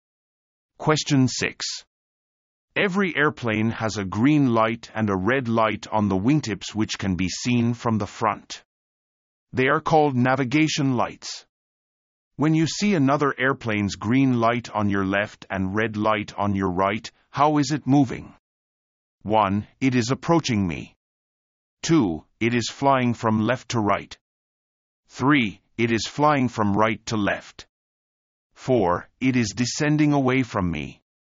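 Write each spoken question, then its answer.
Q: When you see another airplane's green light on your left and red light on your right, how is it moving?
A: 1: It is approaching me.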